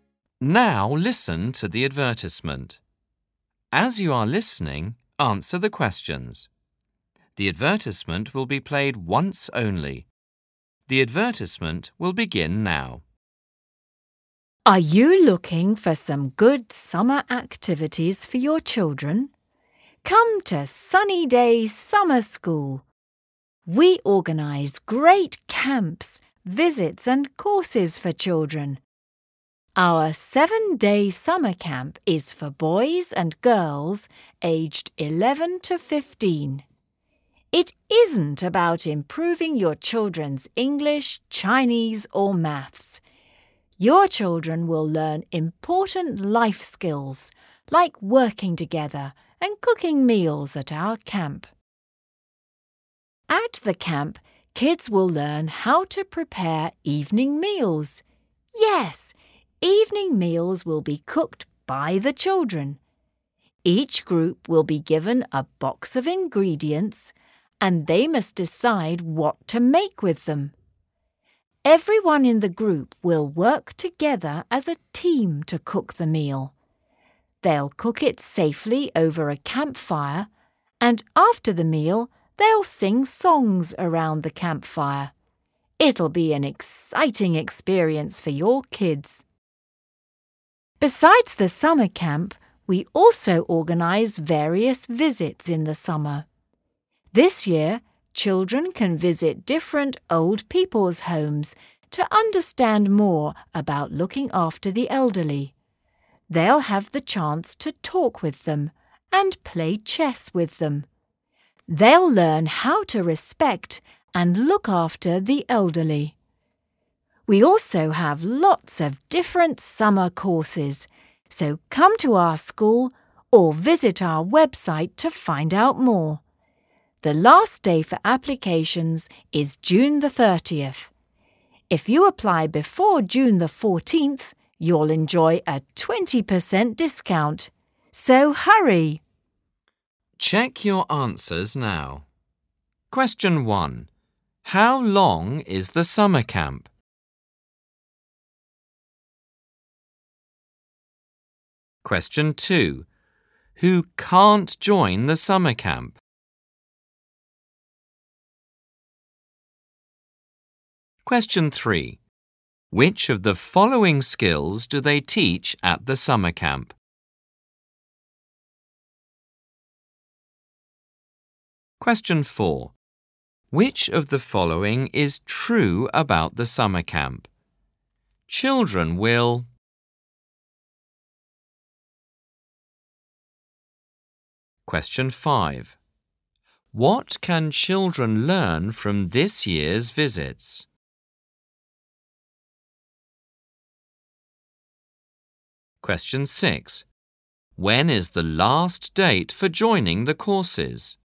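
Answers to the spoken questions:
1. 7 days
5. How to respect and look after the elderly
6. June the 30th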